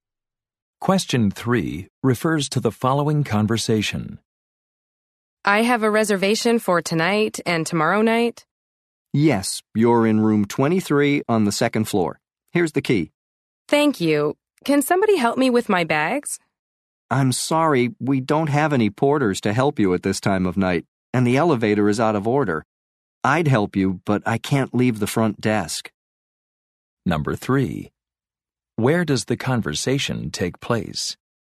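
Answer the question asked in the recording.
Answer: At a hotel front desk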